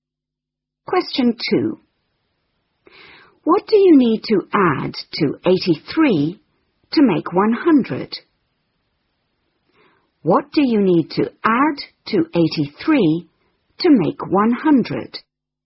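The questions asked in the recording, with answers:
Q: What do you need to add to 83 to make 100?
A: 17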